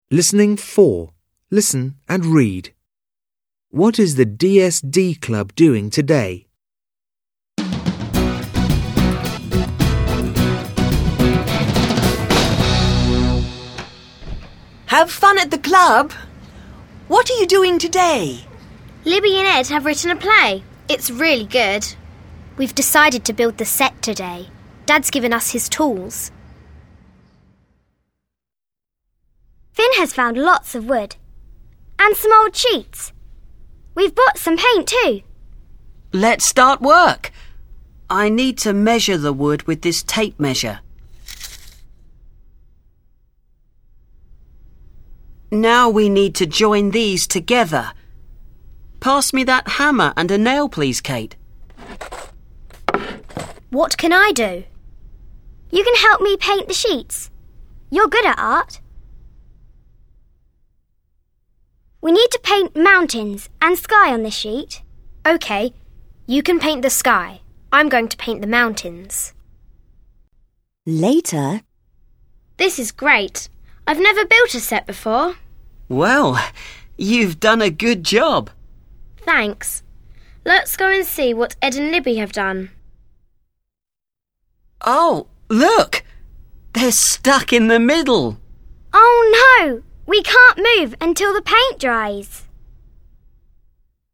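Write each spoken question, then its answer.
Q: What is the DSD Club doing today?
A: They are building the set for a play.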